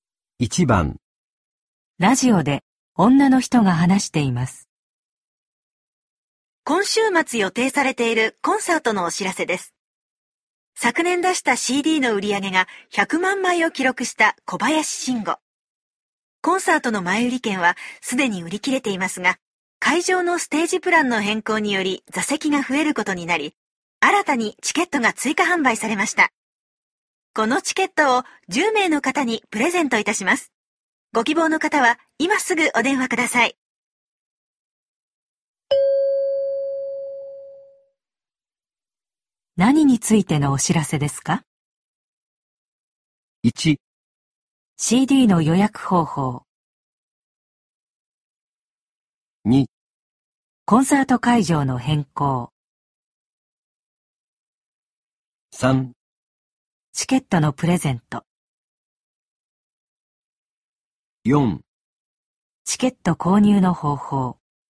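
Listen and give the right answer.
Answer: 3: チケットのプレゼント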